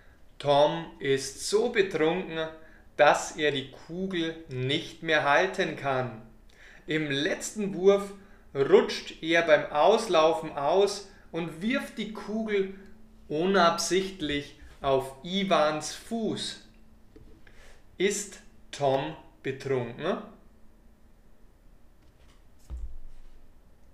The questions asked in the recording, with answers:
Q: Ist Tom betrunken?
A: Ja, er ist betrunken.